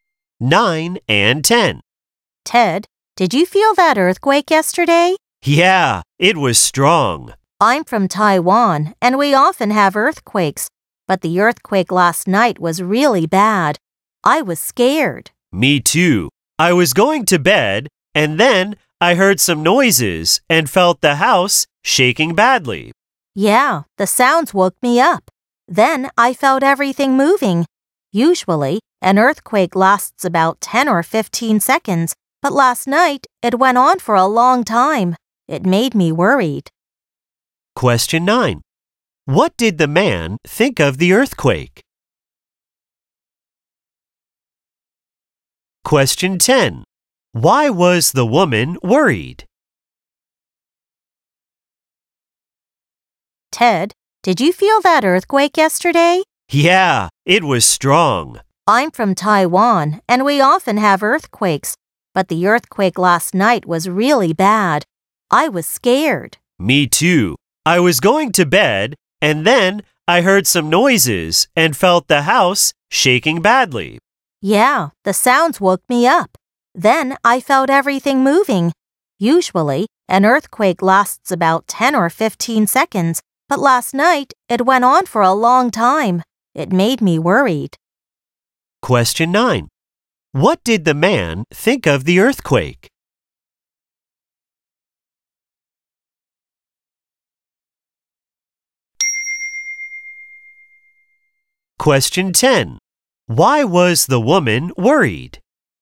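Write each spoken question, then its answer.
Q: What did the man think of the earthquake?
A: It was strong and really bad; he was scared

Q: Why was the woman worried?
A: The earthquake went on for a long time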